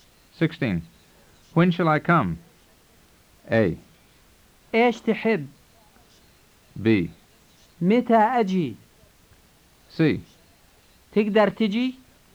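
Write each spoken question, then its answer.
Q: When shall I come?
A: B: متى أجي؟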